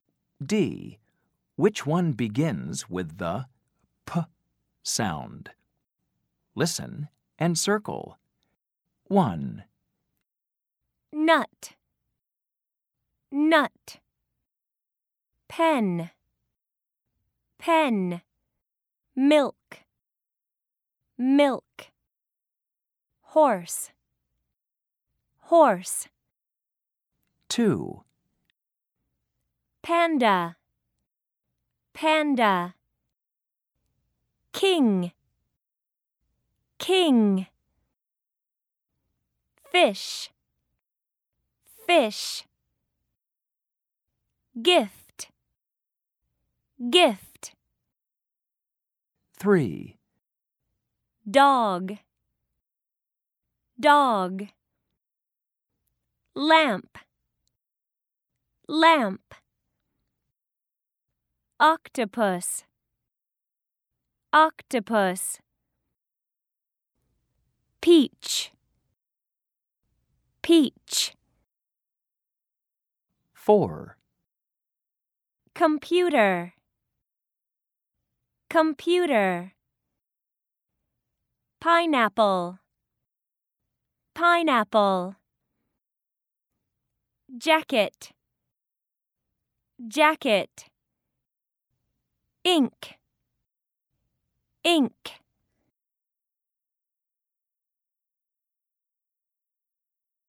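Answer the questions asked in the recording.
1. Pen
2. Panda
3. Peach
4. Pineapple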